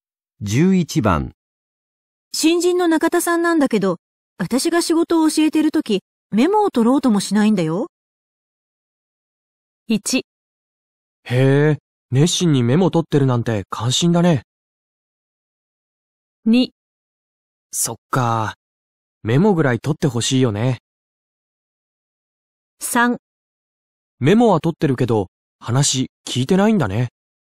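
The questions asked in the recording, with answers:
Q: 新人の中田さんなんだけど、私が仕事を教えてるとき、メモを取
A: 2: そっか、メモぐらい取ってほしいよね。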